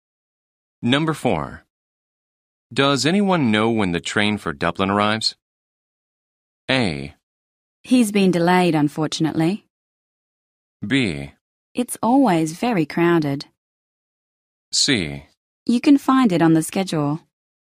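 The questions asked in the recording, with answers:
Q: Does anyone know when the train for Dublin arrives?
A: C: You can find it on the schedule.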